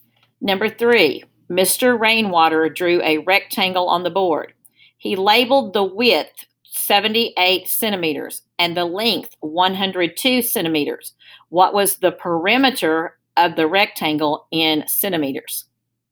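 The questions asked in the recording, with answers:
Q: What was the perimeter of the rectangle in centimeters?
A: 360 centimeters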